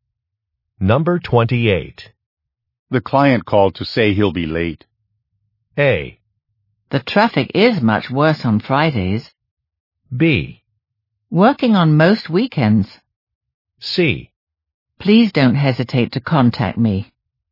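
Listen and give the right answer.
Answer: A: The traffic is much worse on Fridays.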